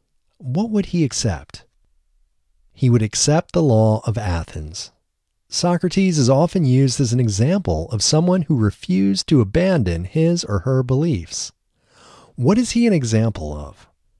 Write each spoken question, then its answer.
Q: What is he an example of?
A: He is an example of someone who refused to abandon his or her beliefs.